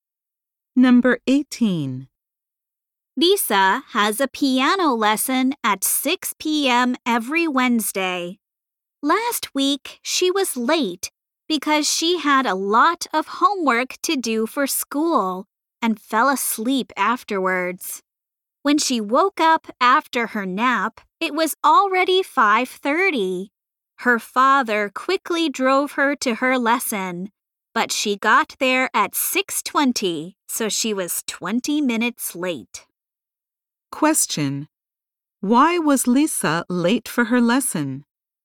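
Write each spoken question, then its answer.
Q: Why was Lisa late for her lesson?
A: She fell asleep after doing her homework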